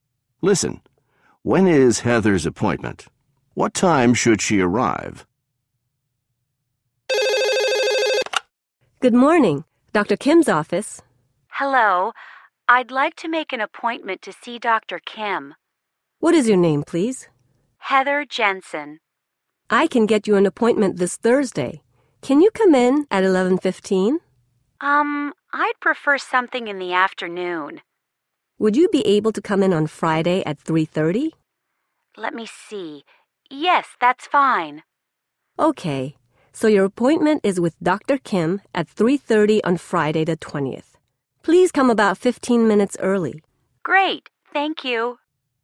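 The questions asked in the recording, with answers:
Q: When is Heather's appointment?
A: Friday the 20th at 3:30

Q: What time should she arrive?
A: About 3:15 (15 minutes early)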